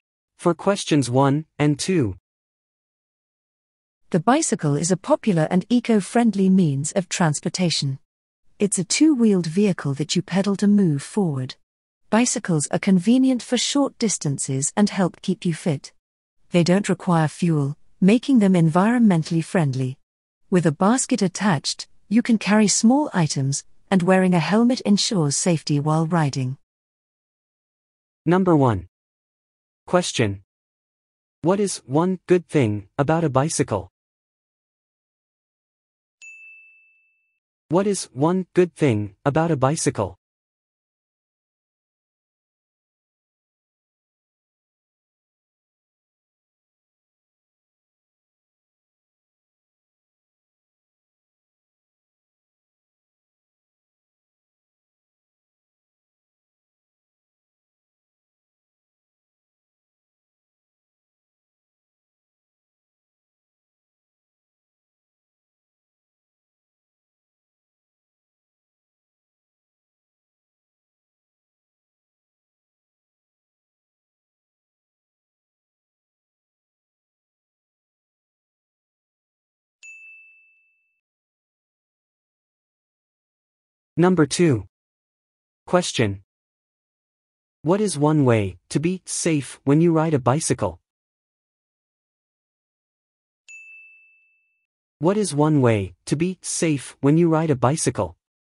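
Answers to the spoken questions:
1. It is eco-friendly / needs no fuel / keeps you fit
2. Wear a helmet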